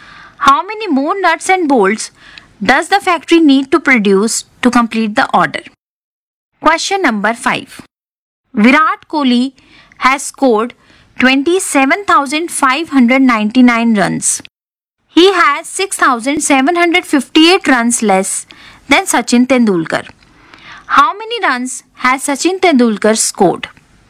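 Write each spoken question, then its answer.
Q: How many runs has Sachin Tendulkar scored?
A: 34,357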